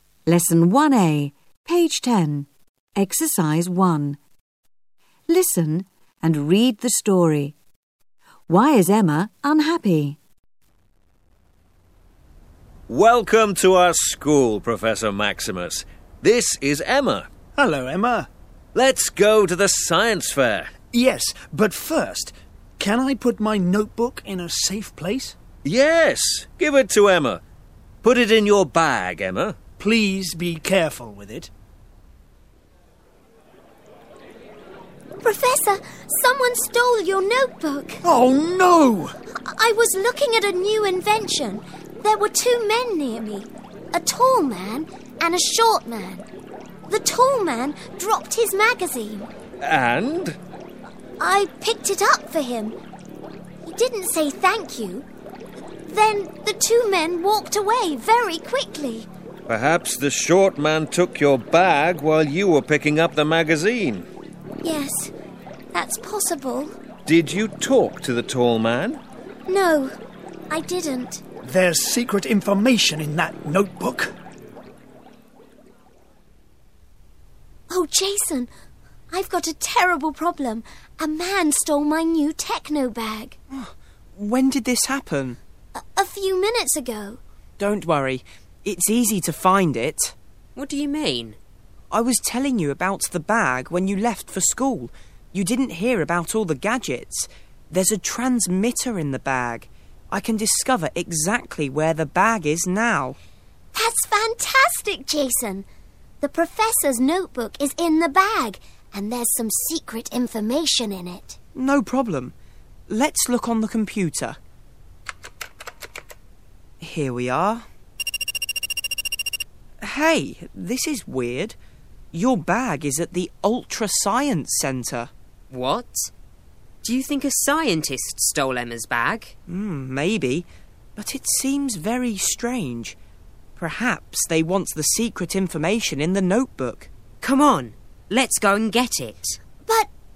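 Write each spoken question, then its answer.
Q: Why is Emma unhappy?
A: Someone stole her bag with the professor's notebook in it.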